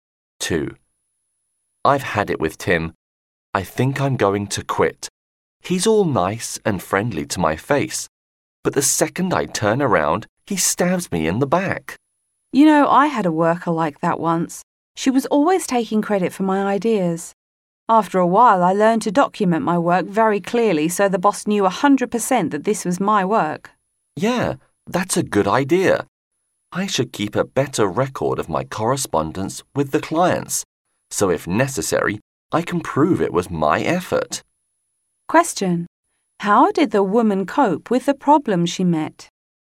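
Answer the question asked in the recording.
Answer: She documented her work very clearly so the boss knew it was hers.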